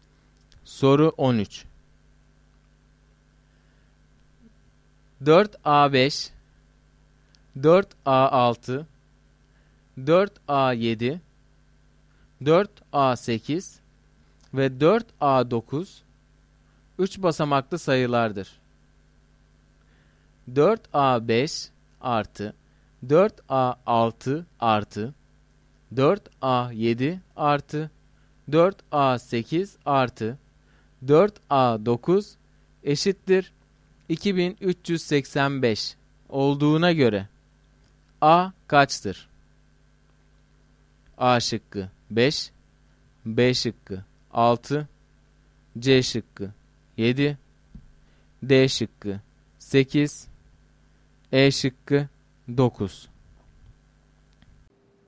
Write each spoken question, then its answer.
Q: 4A5 artı 4A6 artı 4A 7 artı 4A 8 artı 4A 9 eşittir 2385 olduğuna göre A kaçtır?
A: Doğru cevap C şıkkı.